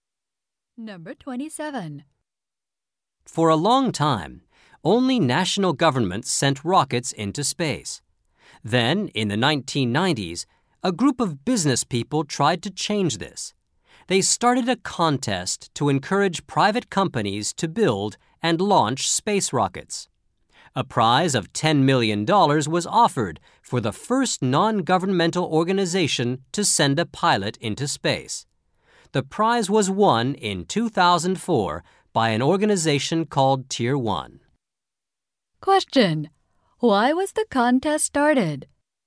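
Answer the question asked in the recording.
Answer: To encourage private companies to build and launch space rockets.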